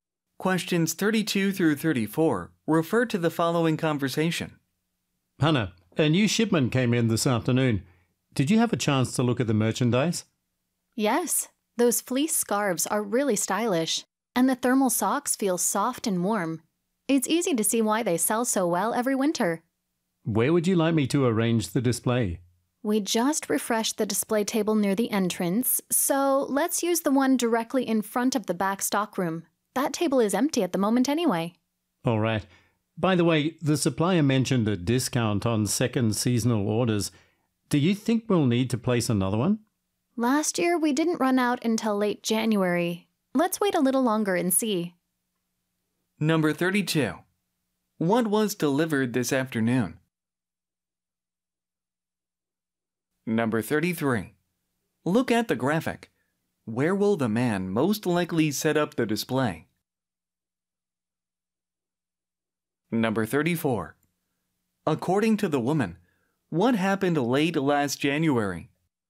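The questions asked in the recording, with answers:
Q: What was delivered this afternoon?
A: Winter merchandise: fleece scarves and thermal socks

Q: According to the woman, what happened late last January?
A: The store ran out of the merchandise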